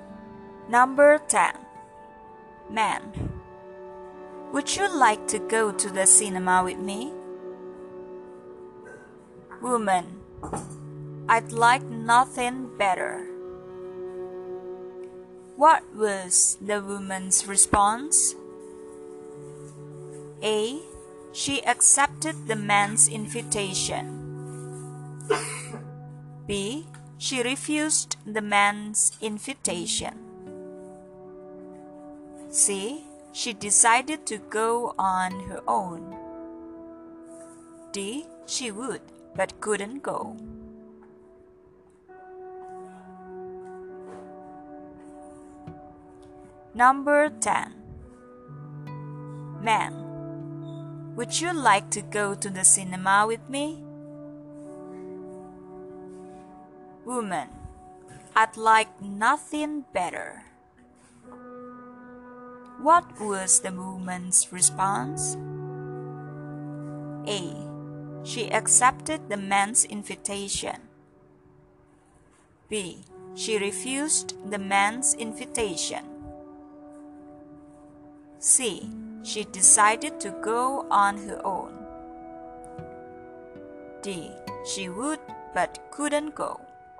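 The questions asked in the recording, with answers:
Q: What was the woman's response?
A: A: She accepted the man's invitation.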